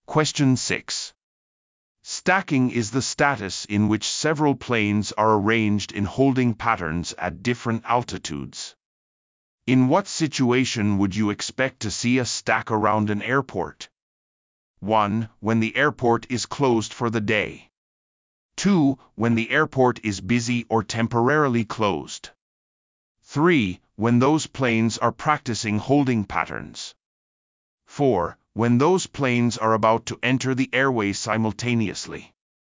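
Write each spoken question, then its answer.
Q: In what situation would you expect to see a stack around an airport?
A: 2: When the airport is busy or temporarily closed.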